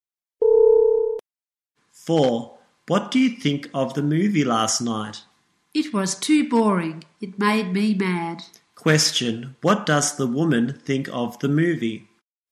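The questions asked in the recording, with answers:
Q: What does the woman think of the movie?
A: It was too boring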